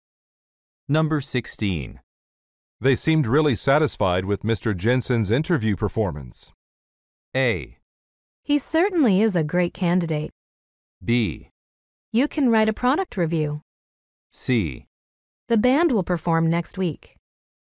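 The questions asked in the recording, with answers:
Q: They seemed really satisfied with Mr. Jensen's interview performance.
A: A: He certainly is a great candidate.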